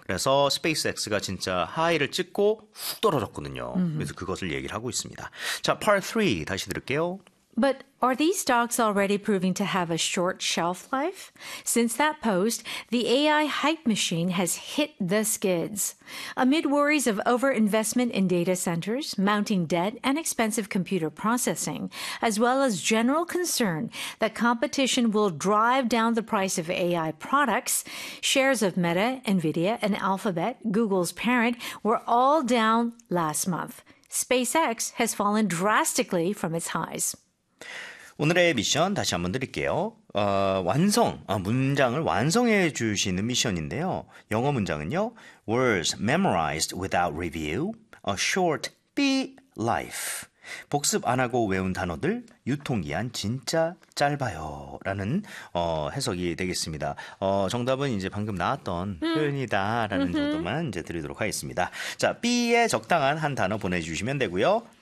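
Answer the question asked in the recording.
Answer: shelf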